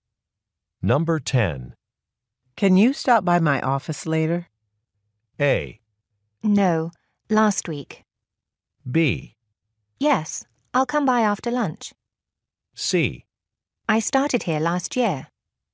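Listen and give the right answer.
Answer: B: Yes, I'll come by after lunch.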